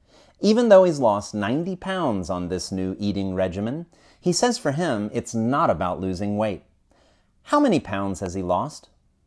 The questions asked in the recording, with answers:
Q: How many pounds has he lost?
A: He has lost 90 pounds.